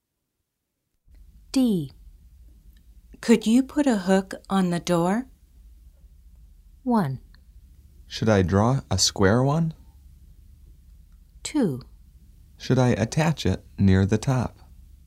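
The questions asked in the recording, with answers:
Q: Could you put a hook on the door?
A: 2: Should I attach it near the top?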